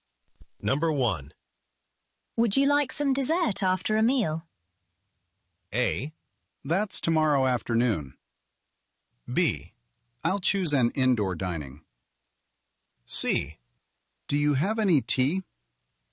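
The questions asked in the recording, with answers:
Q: Would you like some dessert after a meal?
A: C: Do you have any tea?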